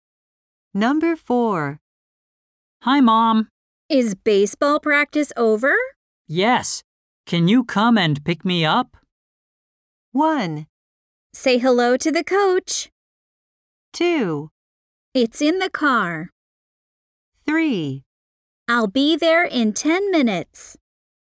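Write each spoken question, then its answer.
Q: Yes. Can you come and pick me up?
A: 3: I'll be there in 10 minutes.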